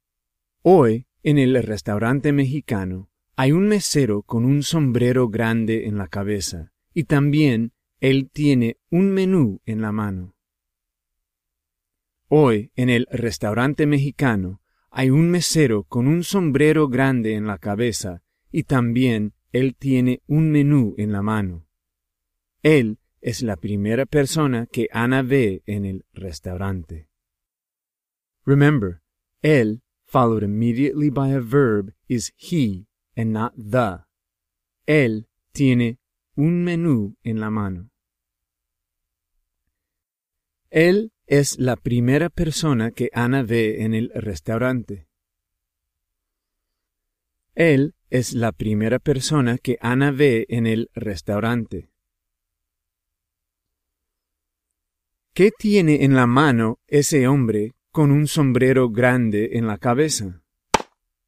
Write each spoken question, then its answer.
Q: ¿Qué tiene en la mano ese hombre con un sombrero grande en la cabeza?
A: Ese hombre tiene un menú en la mano.